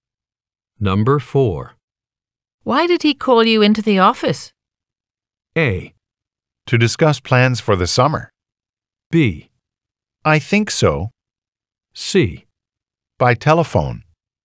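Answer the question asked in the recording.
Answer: A: To discuss plans for the summer.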